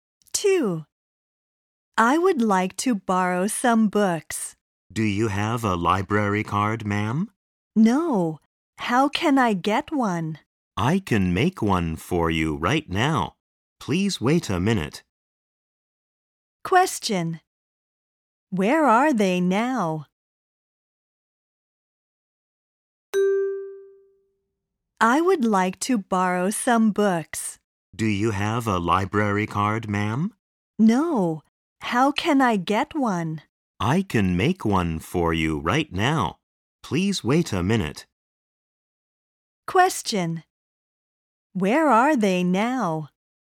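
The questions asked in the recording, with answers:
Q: Where are they now?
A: In a library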